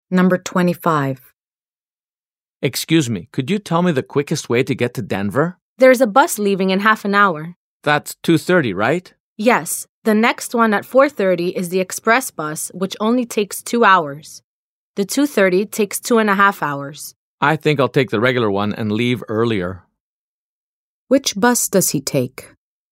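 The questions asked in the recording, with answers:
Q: Which bus does he take?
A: The 2:30 regular bus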